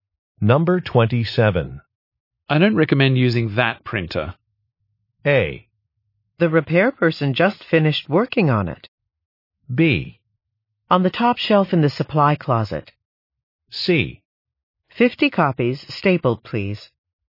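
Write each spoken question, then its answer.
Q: I don't recommend using that printer.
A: A: The repair person just finished working on it.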